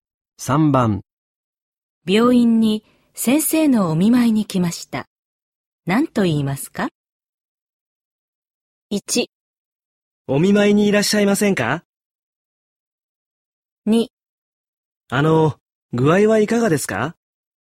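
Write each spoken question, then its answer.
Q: 病院に先生のお見舞いに来ました。何と言いますか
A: 2: あの、具合はいかがですか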